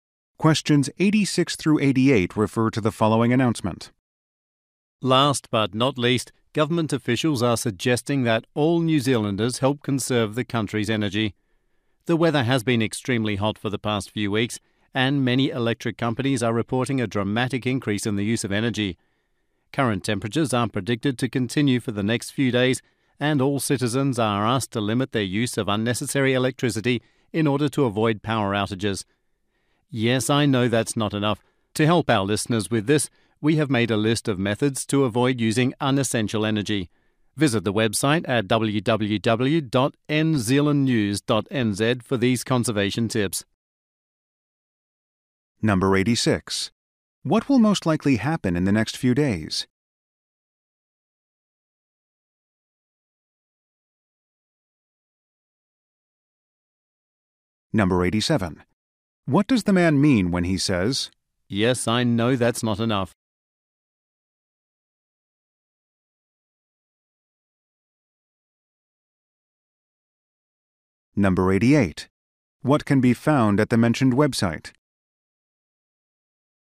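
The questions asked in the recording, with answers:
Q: What will most likely happen in the next few days?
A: The hot weather will continue

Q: What can be found at the mentioned website?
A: Energy conservation tips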